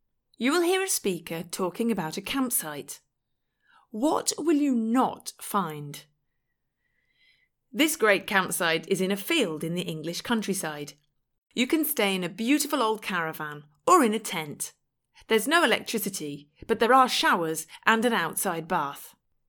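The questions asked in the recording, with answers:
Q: What will you not find?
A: Electricity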